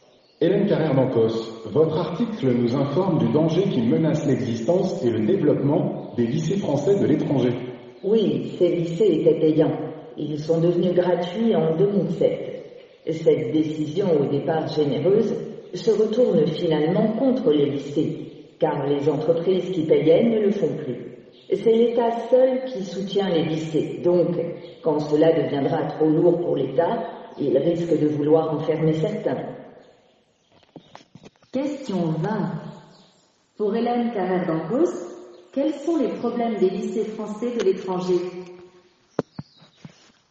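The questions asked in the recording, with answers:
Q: Pour Hélène Carrère-Mancos, quels sont les problèmes des lycées français de l'étranger ?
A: Devenus gratuits en 2007, ils ne sont plus financés par les entreprises ; seul l'État les soutient et il risque d'en fermer certains.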